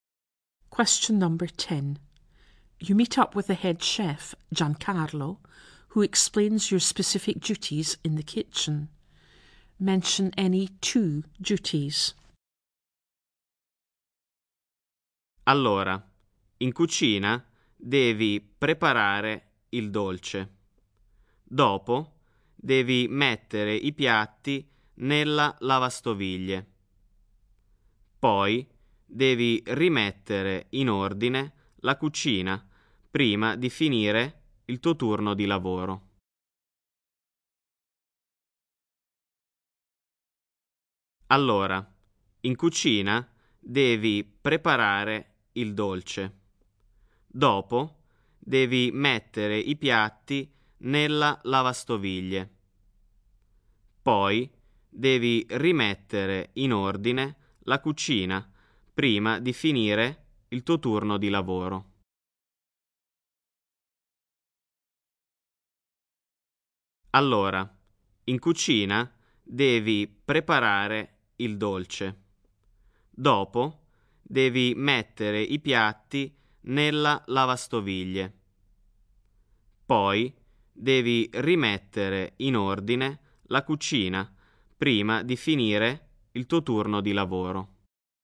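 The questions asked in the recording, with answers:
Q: Mention any two duties.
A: Any two: make the dessert, put the dishes in the dishwasher, tidy the kitchen before the end of your shift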